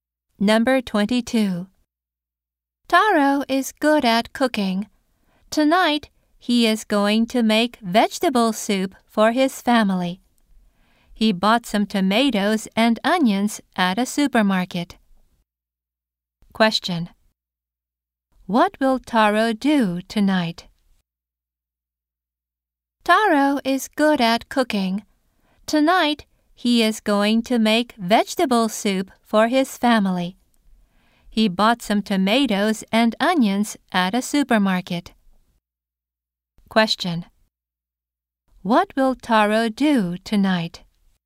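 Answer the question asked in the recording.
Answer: Make vegetable soup for his family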